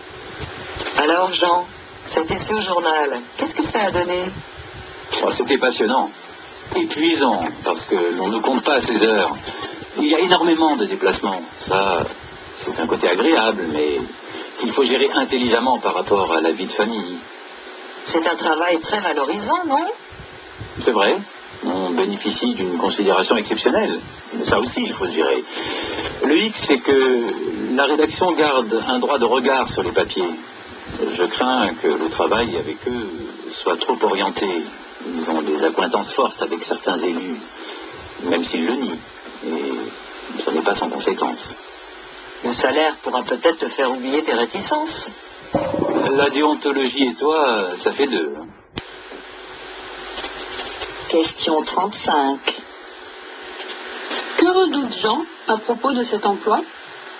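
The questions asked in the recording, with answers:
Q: Que redoute Jean à propos de cet emploi ?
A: Que le travail soit trop orienté politiquement (manque d'indépendance, la rédaction ayant des liens avec certains élus)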